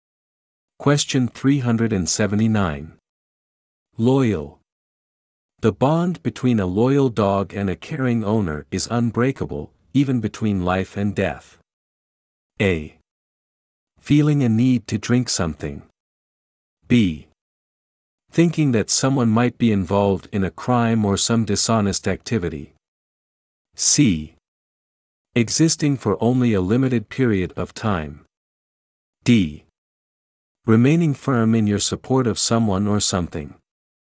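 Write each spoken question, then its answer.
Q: Loyal. The bond between a loyal dog and a caring owner is unbreakable, even between life and death.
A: D: Remaining firm in your support of someone or something.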